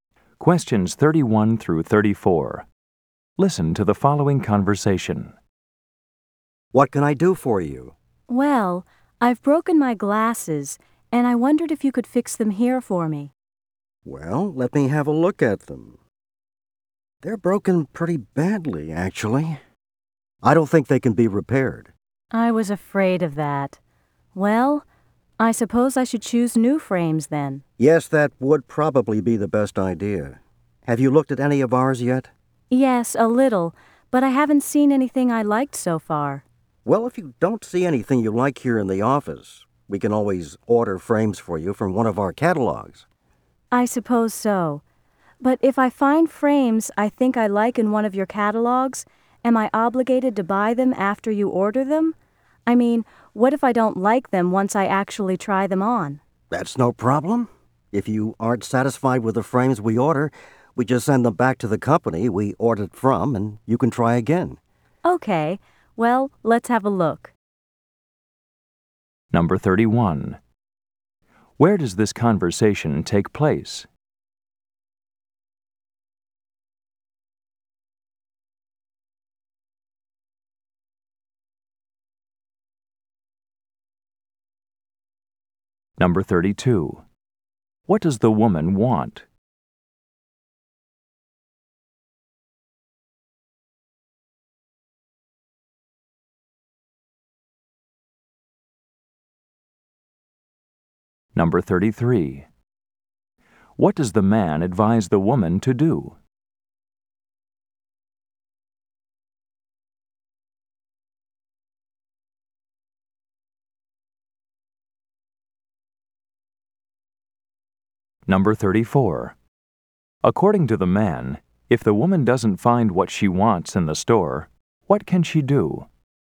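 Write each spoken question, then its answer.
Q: Where does this conversation take place?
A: At an optician's office

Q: What does the woman want?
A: To have her broken glasses fixed

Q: What does the man advise the woman to do?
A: Choose new frames

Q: According to the man, if the woman doesn't find what she wants in the store, what can she do?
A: Order frames from one of their catalogs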